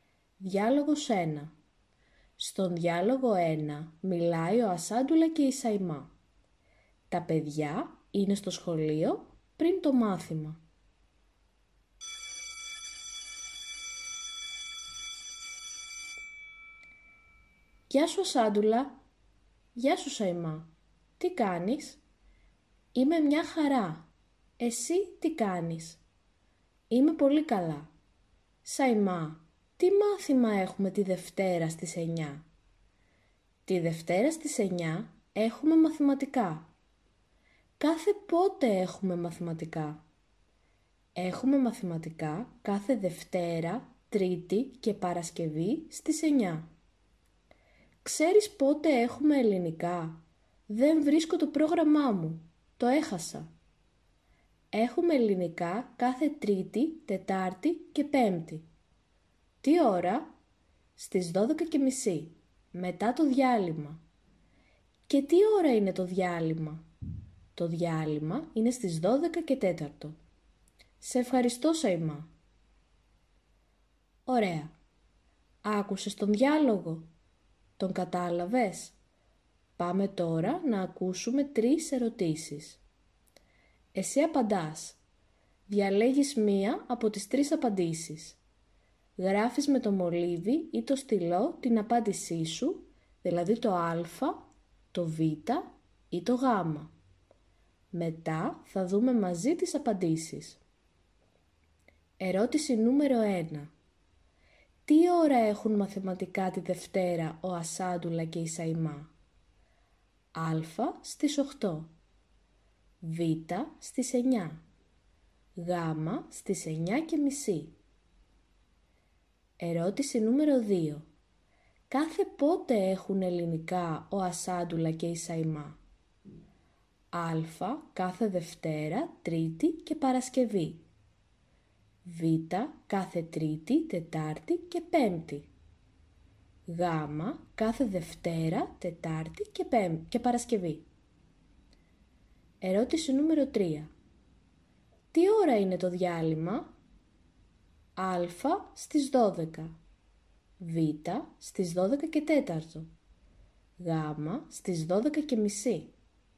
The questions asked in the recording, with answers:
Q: Τι ώρα έχουν μαθηματικά τη Δευτέρα ο Ασάντουλα και η Σαϊμά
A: Στην ερώτηση νούμερο 1, η σωστή απάντηση είναι το Β.

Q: Τι ώρα είναι το διάλειμμα?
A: Στην ερώτηση νούμερο 3, η σωστή απάντηση είναι το Β.